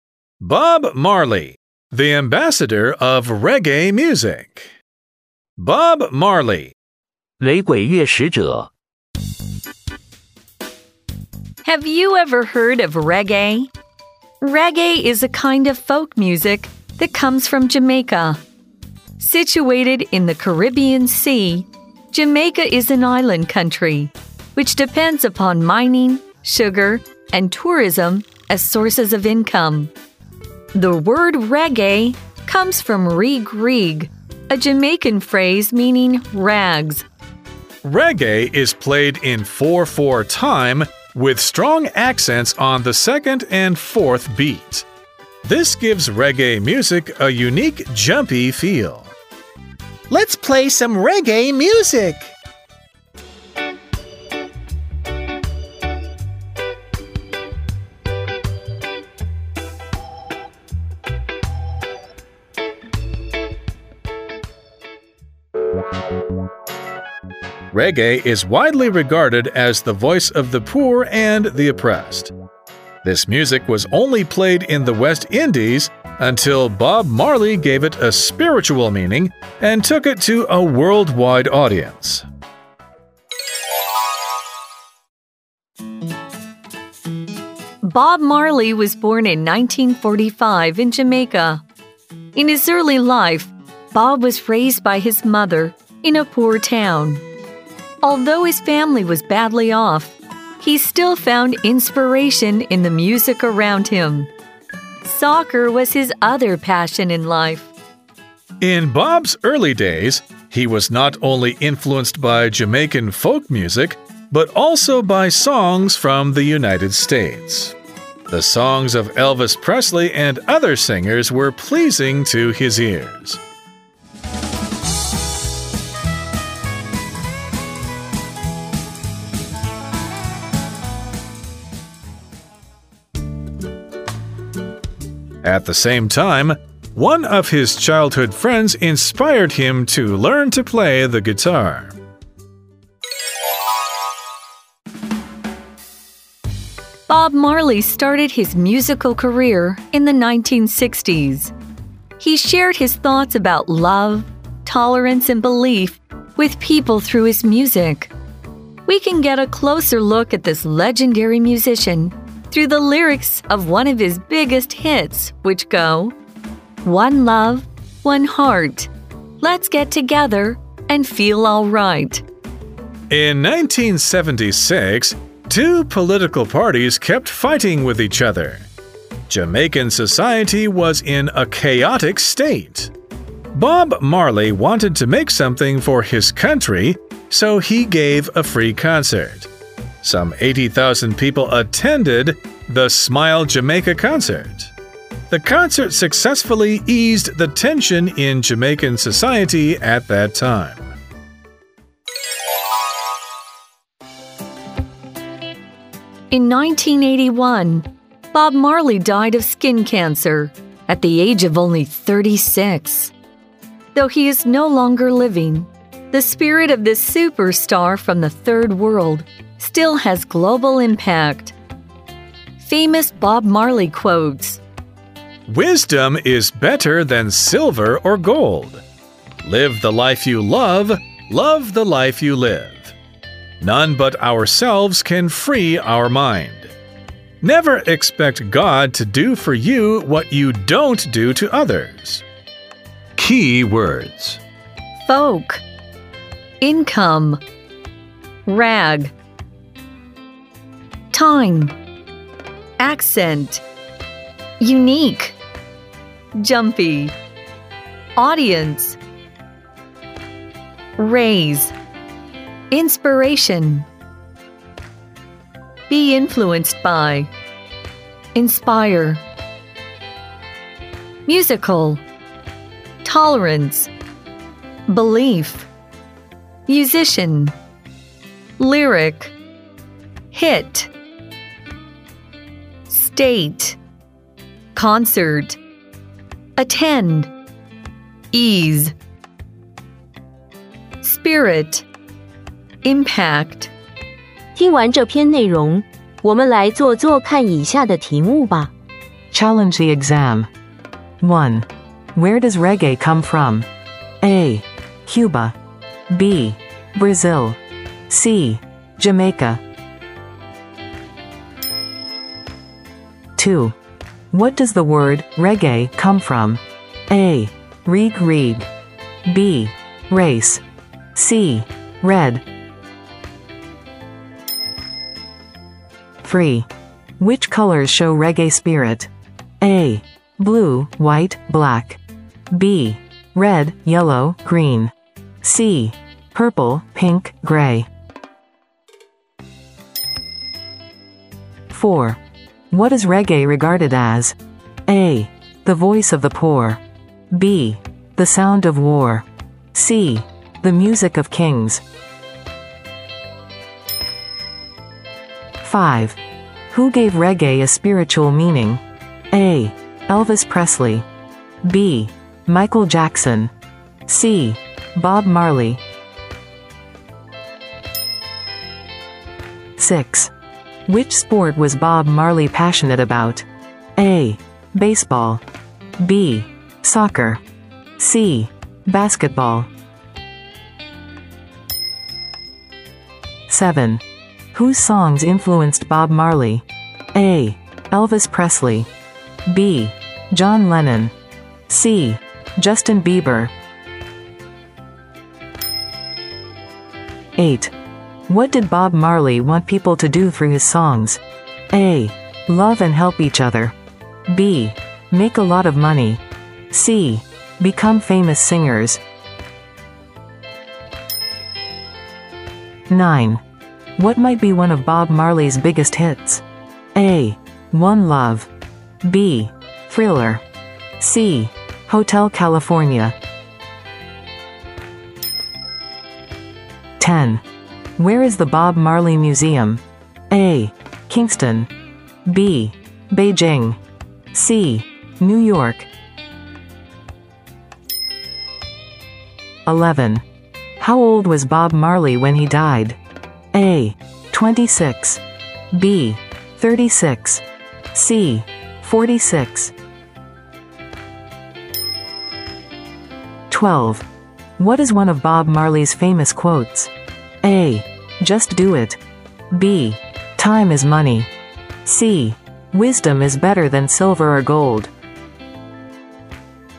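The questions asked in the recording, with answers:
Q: Where does reggae come from?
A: C: Jamaica.

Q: What does the word reggae come from?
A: A: Reg Reg.

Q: What is reggae regarded as?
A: A: The voice of the poor.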